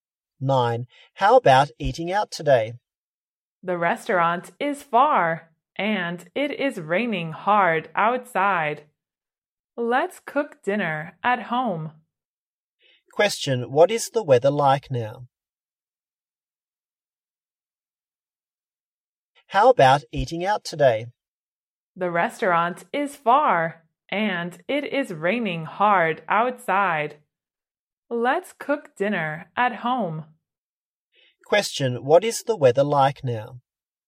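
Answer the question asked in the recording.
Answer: It is raining hard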